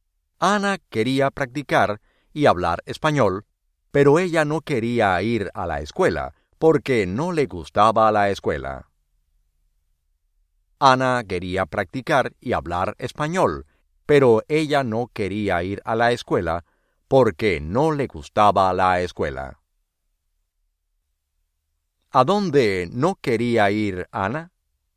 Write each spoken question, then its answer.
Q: ¿A dónde no quería ir Ana?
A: A la escuela.